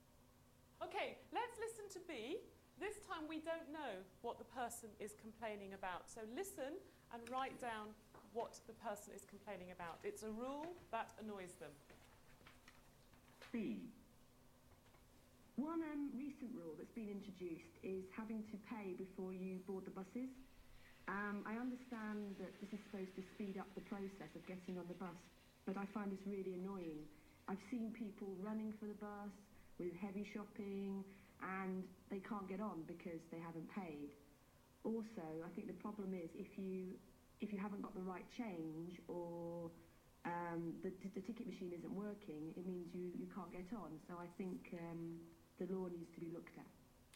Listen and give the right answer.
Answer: Very good. Paying before you board the bus.